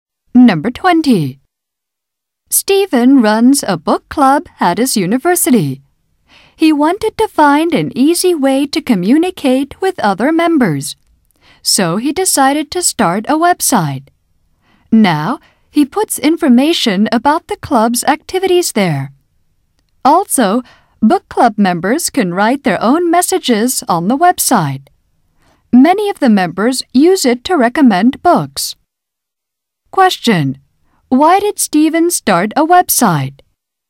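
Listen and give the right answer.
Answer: To find an easy way to communicate with other book club members.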